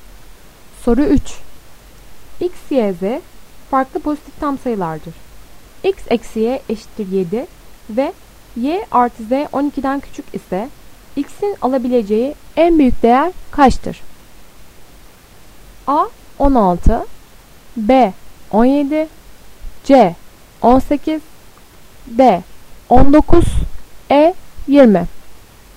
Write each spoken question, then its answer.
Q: X eksi Y eşittir 7 ve Y artı Z 12'den küçük ise X'in alabileceği en büyük değer kaçtır?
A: Doğru cevap B 17.